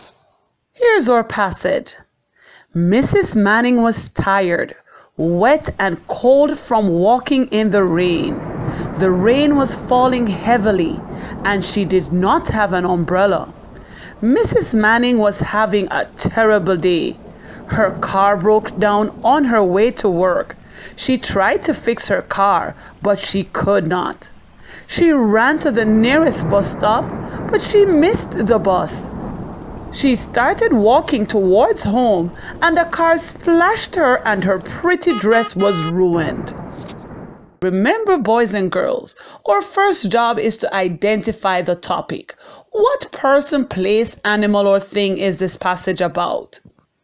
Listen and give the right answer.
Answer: Did you say the passage is about a person named Mrs.